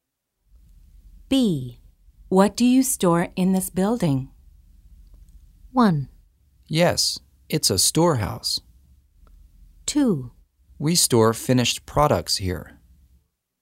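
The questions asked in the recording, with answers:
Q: What do you store in this building?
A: 2: We store finished products here.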